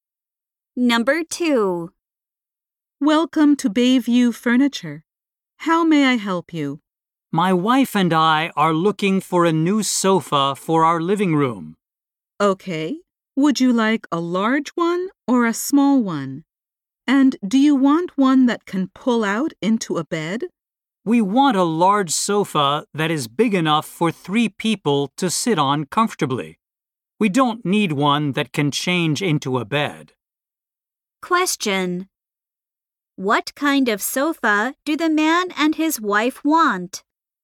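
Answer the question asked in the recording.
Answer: A large sofa for 3 people that doesn't turn into a bed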